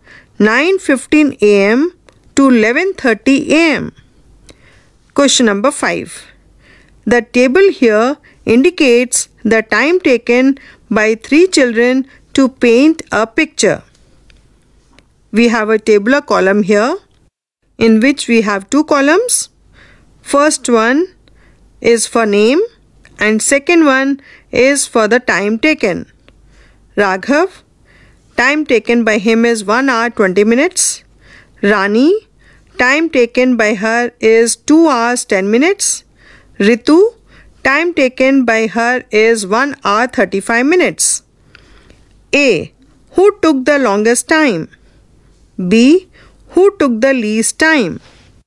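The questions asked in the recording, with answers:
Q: Who took the longest time?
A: Rani

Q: Who took the least time?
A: Raghav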